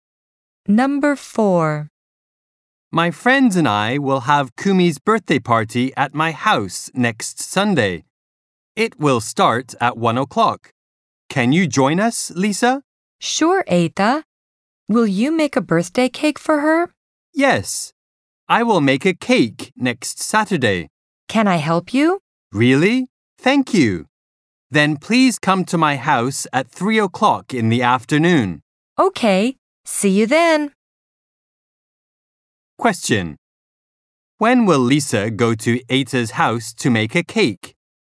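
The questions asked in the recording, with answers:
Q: When will Lisa go to Eita's house to make a cake?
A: Next Saturday at 3 o'clock in the afternoon.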